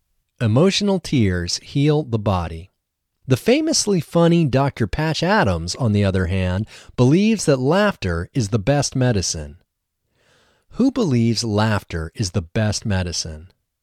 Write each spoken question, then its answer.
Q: Who believes laughter is the best medicine?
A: The famously funny Dr. Patch Adams believes that laughter is the best medicine.